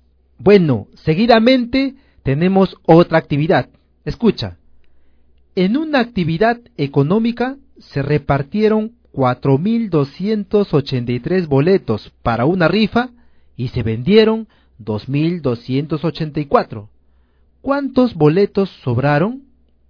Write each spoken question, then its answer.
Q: ¿Cuántos boletos sobraron?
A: 1999.